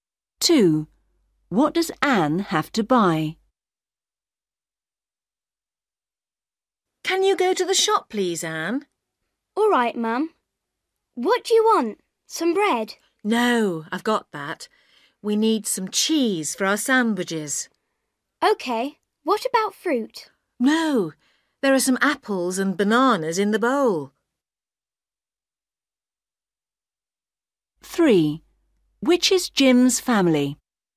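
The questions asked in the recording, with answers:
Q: What does Anne have to buy?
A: some cheese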